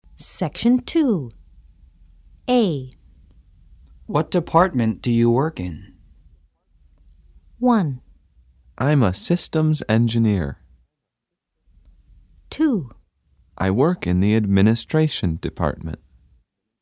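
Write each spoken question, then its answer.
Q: What department do you work in?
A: 2: I work in the administration department.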